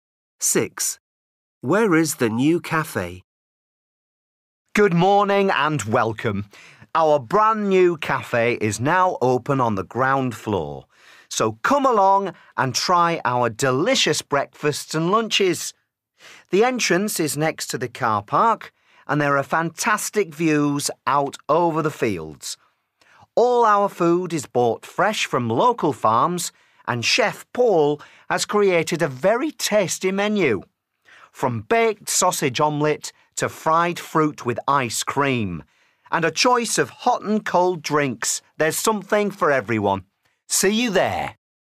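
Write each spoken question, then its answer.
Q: Where is the new cafe?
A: on the ground floor, next to the car park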